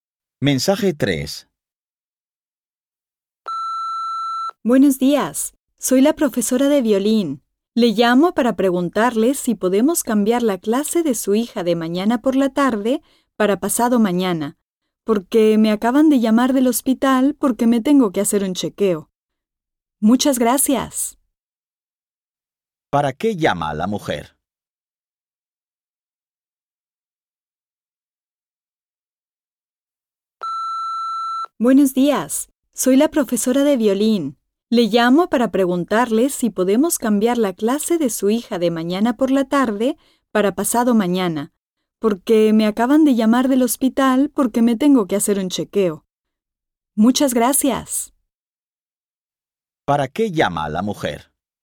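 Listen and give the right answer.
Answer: Para cambiar la clase de violín de su hija a pasado mañana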